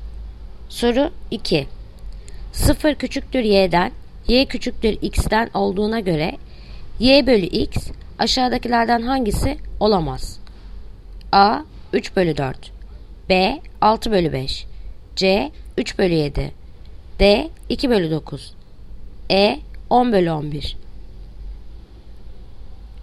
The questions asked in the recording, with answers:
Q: 0 küçüktür y'den, y küçüktür x'ten olduğuna göre y bölü x aşağıdakilerden hangisi olamaz?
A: Yanıt Bursa 6 bölü 5.